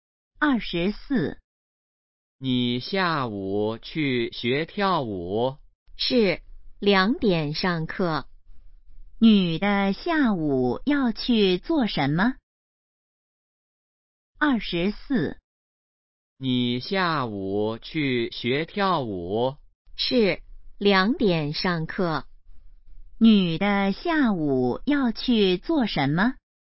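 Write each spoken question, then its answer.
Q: 女的下午要去做什么?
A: 学跳舞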